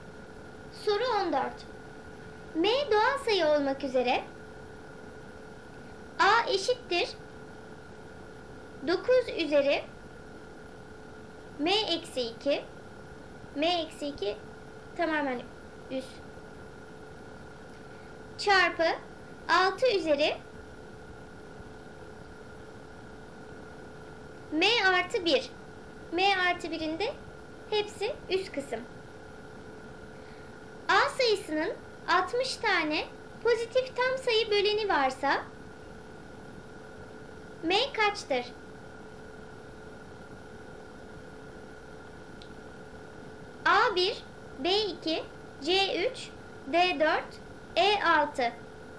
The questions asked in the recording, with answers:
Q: A sayısının 60 tane pozitif tam sayı böleni varsa M kaçtır?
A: Doğru cevap D 4.